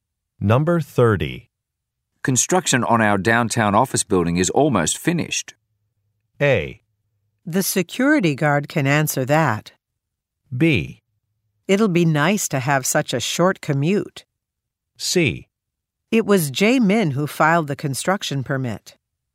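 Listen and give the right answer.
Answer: B: It'll be nice to have such a short commute.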